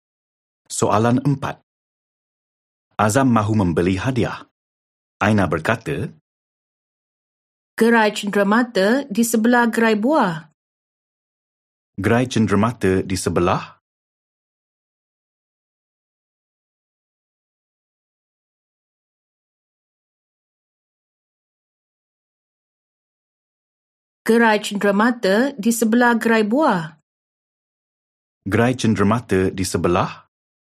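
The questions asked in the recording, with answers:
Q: Gerai cenderamata di sebelah?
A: Gerai buah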